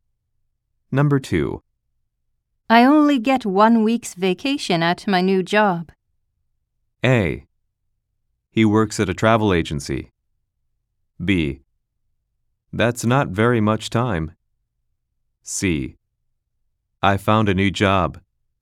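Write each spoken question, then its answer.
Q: I only get 1 week's vacation at my new job.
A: B: That's not very much time.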